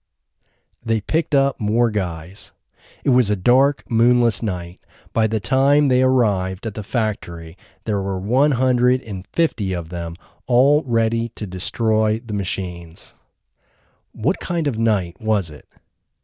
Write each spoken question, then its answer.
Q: What kind of night was it?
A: It was a dark, moonless night.